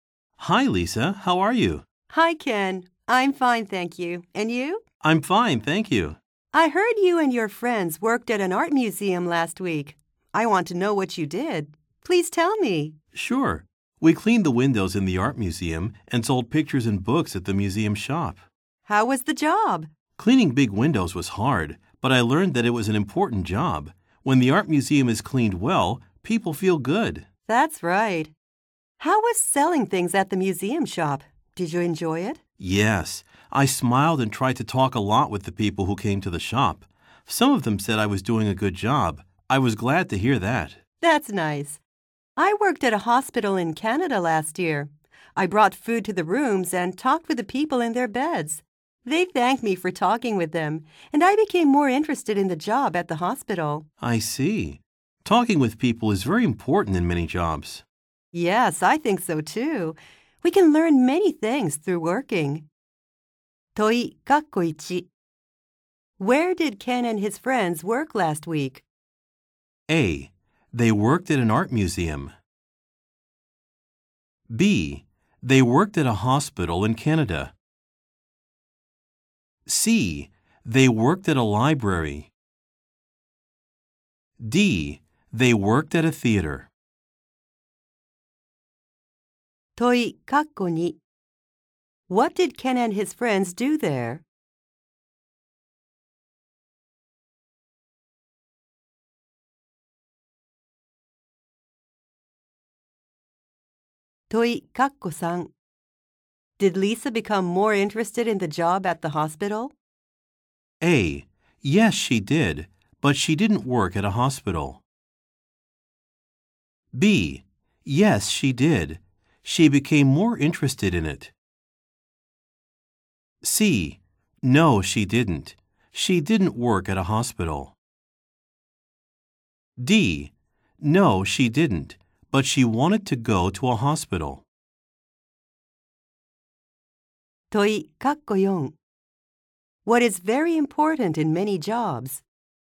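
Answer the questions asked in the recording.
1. A: They worked at an art museum.
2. They cleaned the windows and sold pictures and books at the museum shop.
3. B: Yes, she did. She became more interested in it.
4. Talking with people.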